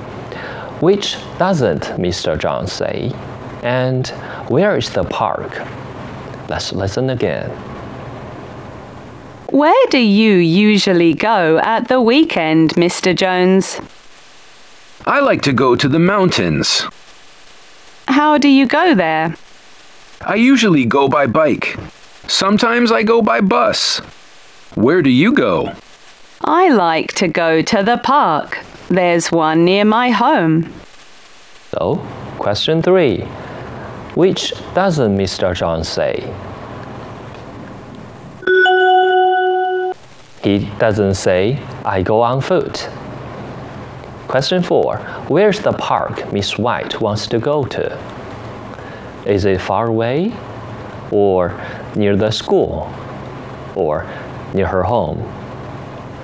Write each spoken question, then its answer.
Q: Where's the park Miss White wants to go to? Is it far away? Or near the school? Or near her home?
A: So we choose C.